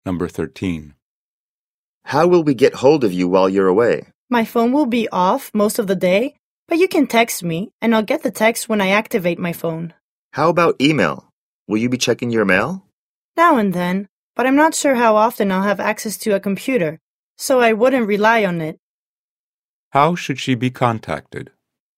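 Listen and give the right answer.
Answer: By text message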